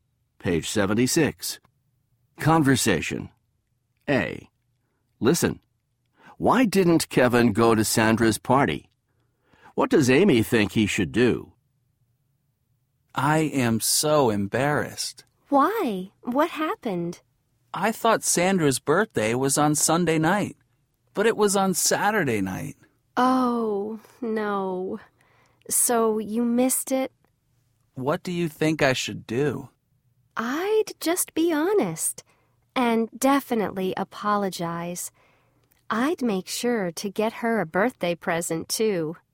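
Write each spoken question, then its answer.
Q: Why didn't Kevin go to Sandra's party?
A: He thought her birthday party was on Sunday night, but it was on Saturday night.

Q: What does Amy think he should do?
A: Be honest, apologize, and get her a birthday present.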